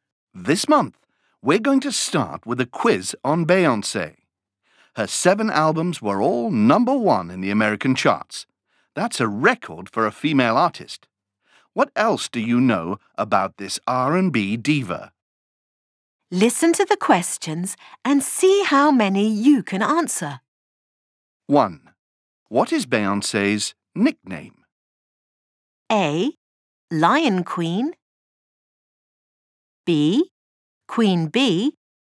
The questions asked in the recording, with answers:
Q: What is Beyoncé's nickname?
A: The answer is B. Beyoncé's nickname is Queen Bee.